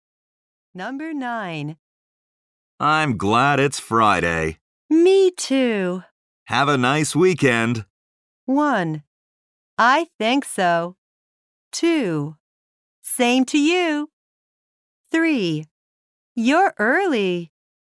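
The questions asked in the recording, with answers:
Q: Have a nice weekend.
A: 2: Same to you.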